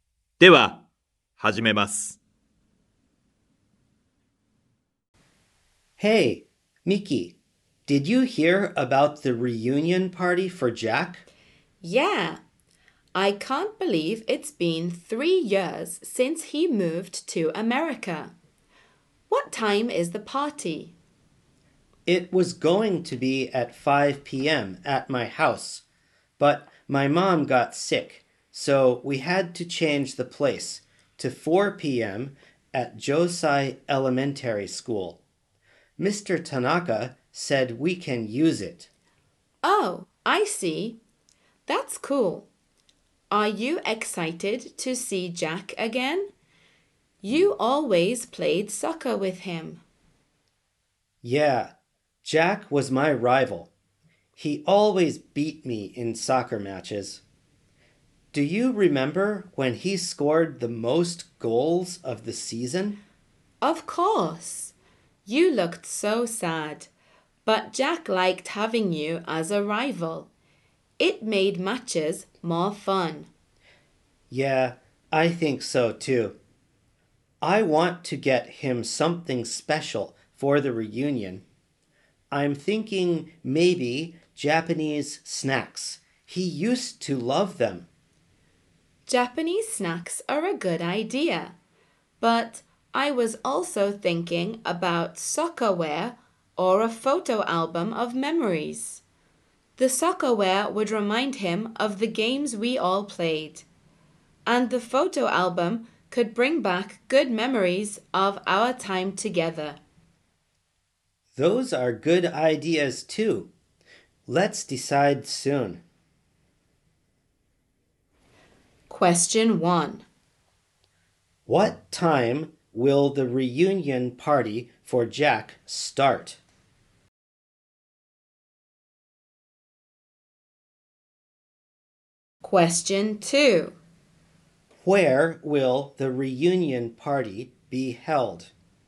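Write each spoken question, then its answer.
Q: What time will the reunion party for Jack start?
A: At 4 p.m.

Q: Where will the reunion party be held?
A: At Josai Elementary School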